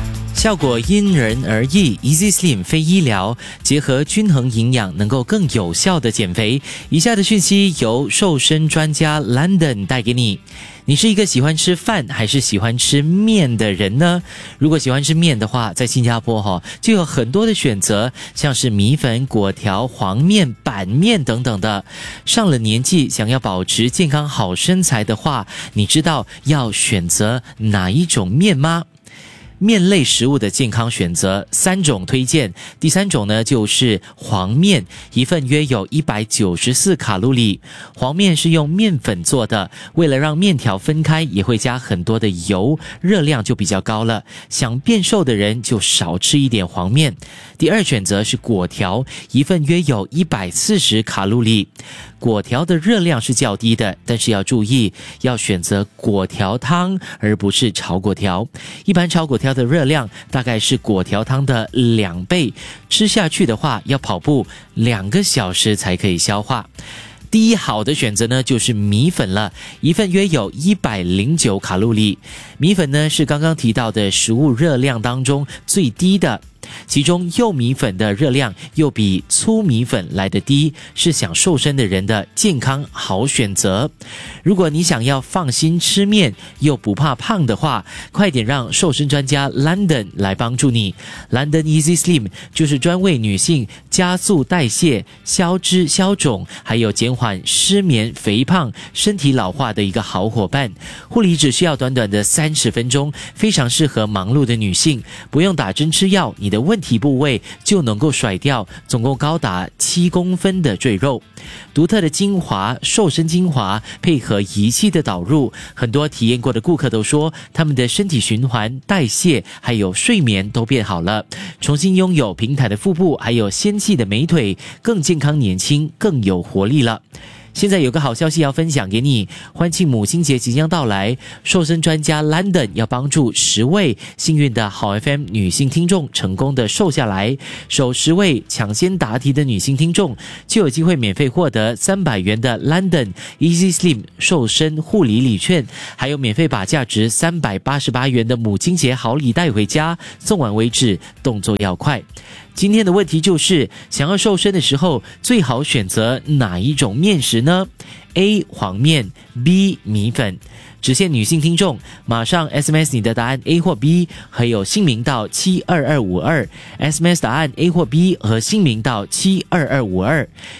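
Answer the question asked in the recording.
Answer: B: 米粉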